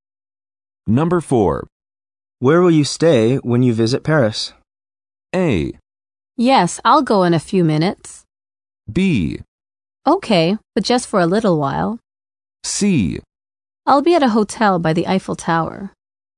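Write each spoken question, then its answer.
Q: Where will you stay when you visit Paris?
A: C: I'll be at a hotel by the Eiffel Tower.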